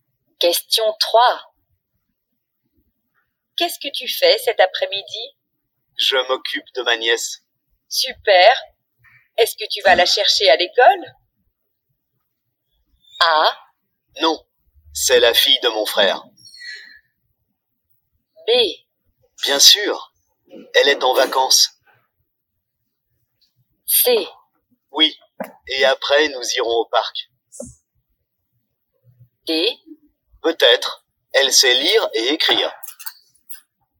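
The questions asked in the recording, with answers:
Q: Est-ce que tu vas la chercher à l'école?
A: C: Oui, et après nous irons au parc.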